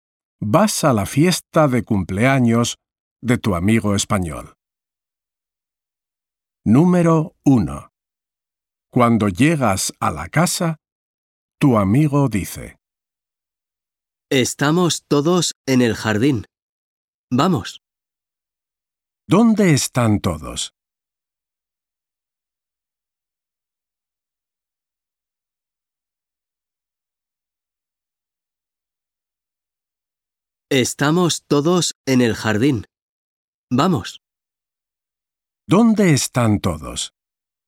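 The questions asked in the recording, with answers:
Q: ¿Dónde están todos?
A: En el jardín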